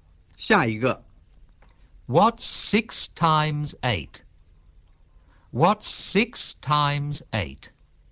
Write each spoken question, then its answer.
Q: What's 6 times 8?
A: 48.